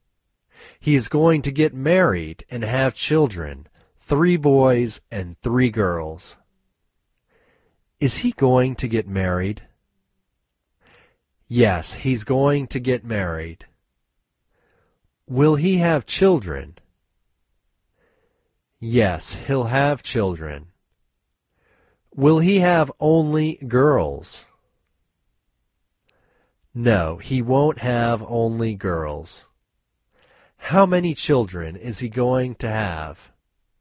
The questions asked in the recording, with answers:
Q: How many children is he going to have?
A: He is going to have 3 girls and 3 boys.